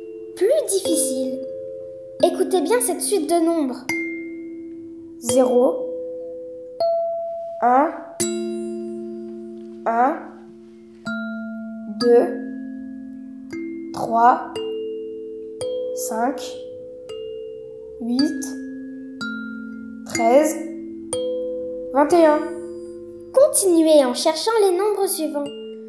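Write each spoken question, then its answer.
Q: Continuez en cherchant les nombres suivants.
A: 34, 55, 89... (chaque nombre est la somme des deux précédents)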